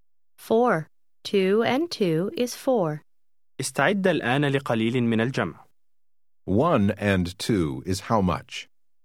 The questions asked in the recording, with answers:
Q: One and two is how much?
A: Three.